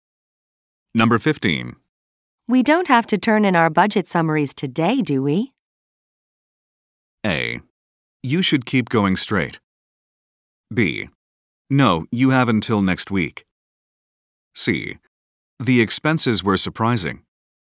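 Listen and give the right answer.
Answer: B: No, you have until next week.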